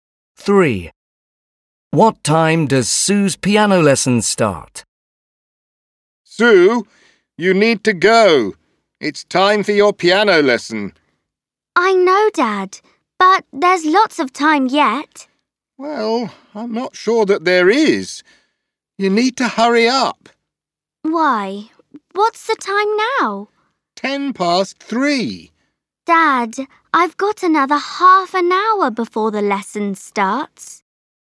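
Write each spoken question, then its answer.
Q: What time does Sue's piano lesson start?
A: 3:40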